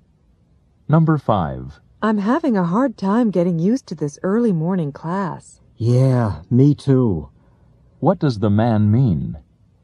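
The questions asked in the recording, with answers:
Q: What does the man mean?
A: He is also having trouble getting used to the early class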